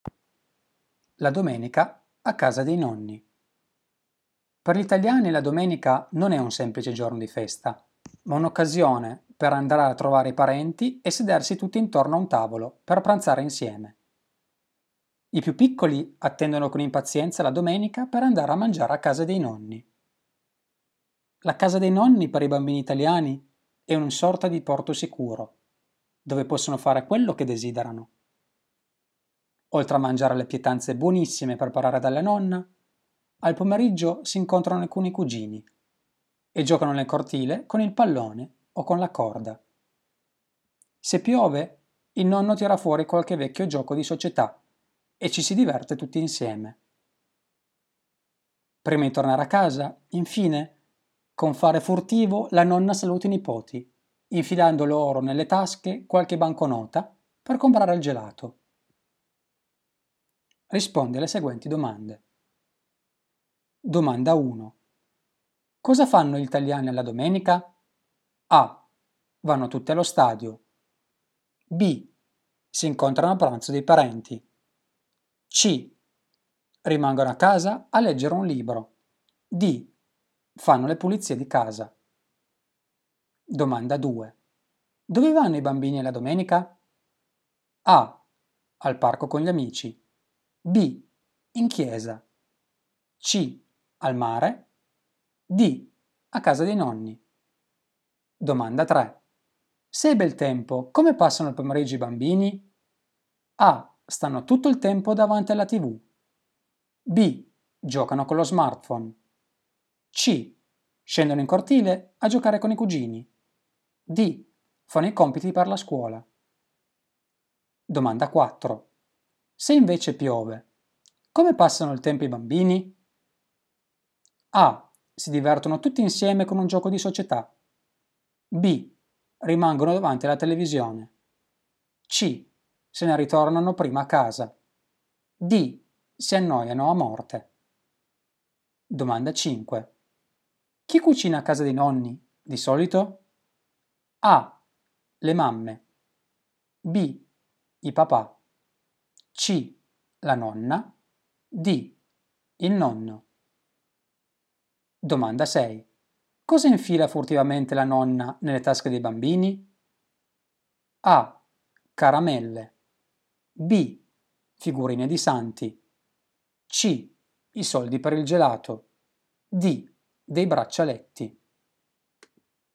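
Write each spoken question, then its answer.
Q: Cosa fanno gli italiani alla domenica?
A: B: Si incontrano a pranzo dei parenti.

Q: Dove vanno i bambini alla domenica?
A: D: A casa dei nonni.

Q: Se è bel tempo, come passano il pomeriggio i bambini?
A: C: Scendono in cortile a giocare con i cugini.

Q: Se invece piove, come passano il tempo i bambini?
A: A: Si divertono tutti insieme con un gioco di società.

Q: Chi cucina a casa dei nonni, di solito?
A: C: La nonna.

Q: Cosa infila furtivamente la nonna nelle tasche dei bambini?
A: C: I soldi per il gelato.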